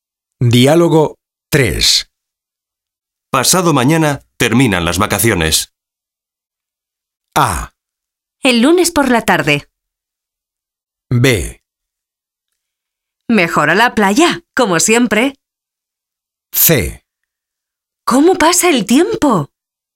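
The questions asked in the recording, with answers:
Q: Pasado mañana terminan las vacaciones.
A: C: ¿Cómo pasa el tiempo?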